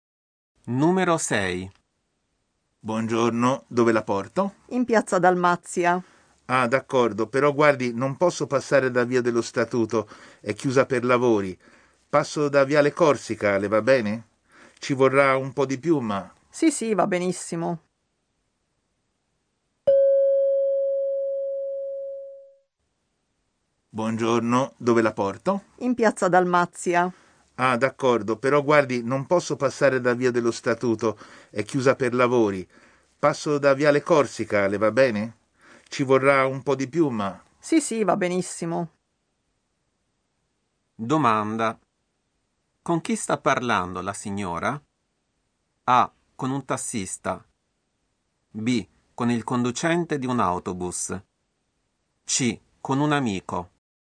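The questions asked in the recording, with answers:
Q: Domanda. Con chi sta parlando la signora?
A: A: Con un tassista.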